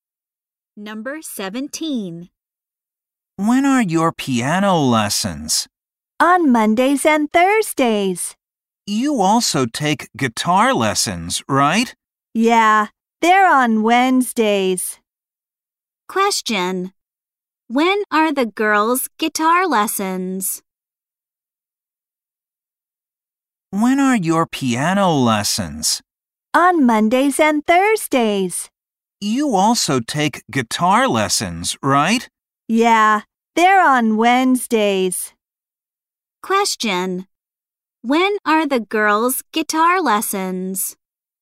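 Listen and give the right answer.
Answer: On Wednesdays.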